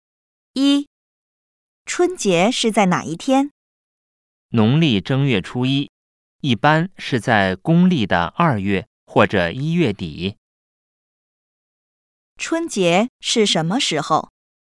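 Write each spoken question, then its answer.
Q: 春节是什么时候?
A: 农历正月初一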